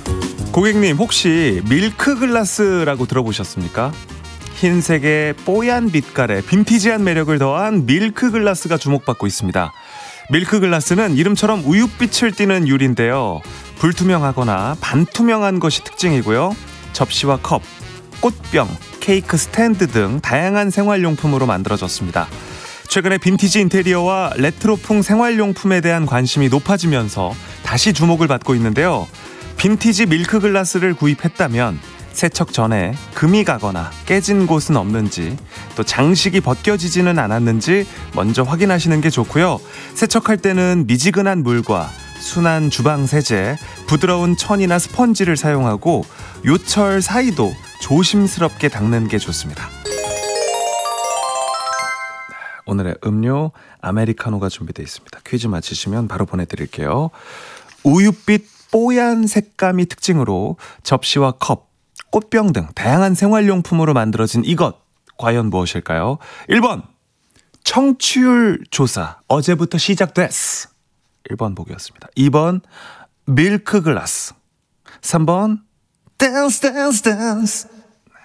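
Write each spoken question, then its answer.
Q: 우윳빛 뽀얀 색감이 특징으로 접시와 컵, 꽃병 등 다양한 생활용품으로 만들어진 이것, 과연 무엇일까요?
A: 2: 밀크글라스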